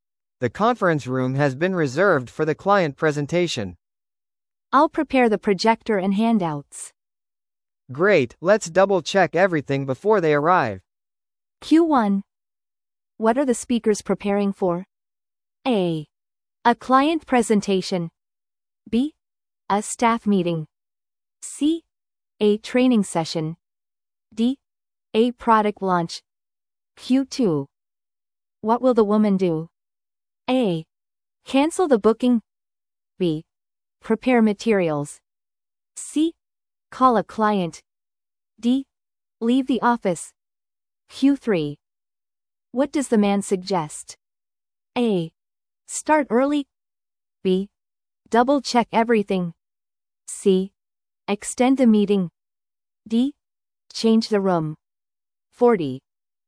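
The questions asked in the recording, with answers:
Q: What are the speakers preparing for?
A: A: A client presentation.

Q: What will the woman do?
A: B: Prepare materials.

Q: What does the man suggest?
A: B: Double check everything.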